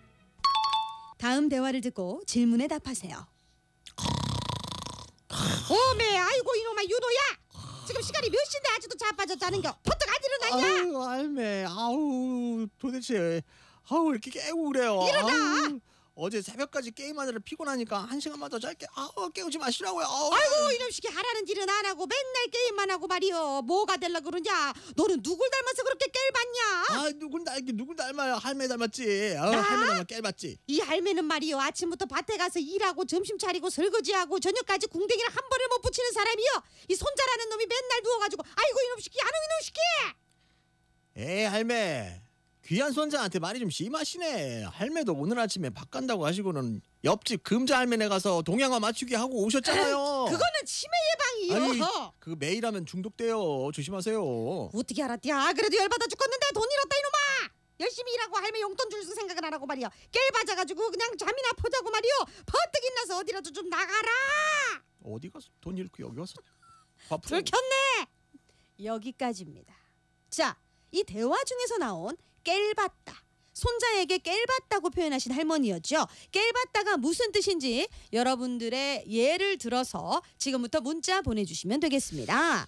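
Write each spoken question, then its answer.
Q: 깰봤다가 무슨 뜻인지 여러분들의 예를 들어서 지금부터 문자 보내주시면 되겠습니다.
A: 게으르다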